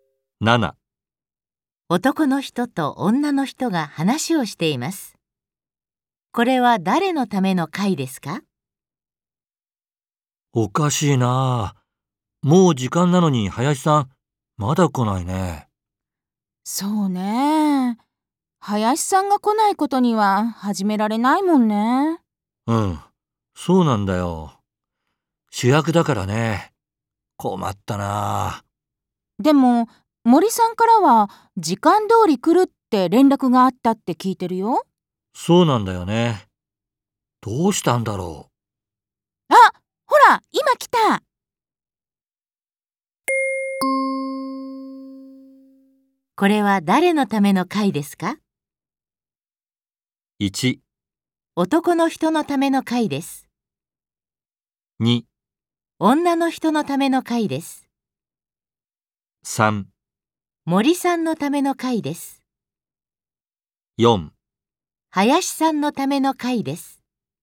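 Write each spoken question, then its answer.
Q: これは誰のための会ですか?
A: 4: 林さんのための会です。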